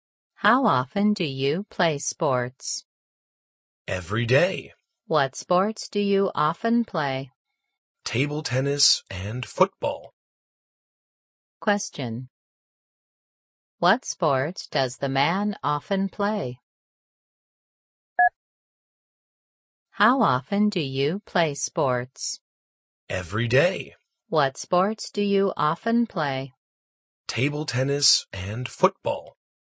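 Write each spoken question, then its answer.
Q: What sport does the man often play?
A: Table tennis and football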